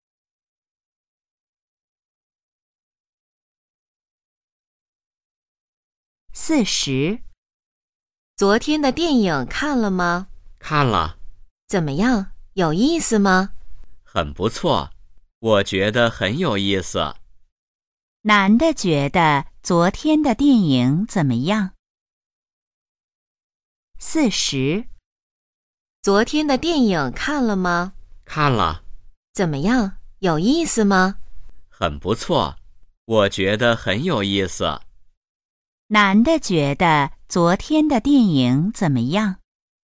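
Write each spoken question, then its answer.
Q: 男的觉得昨天的电影怎么样?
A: 很有意思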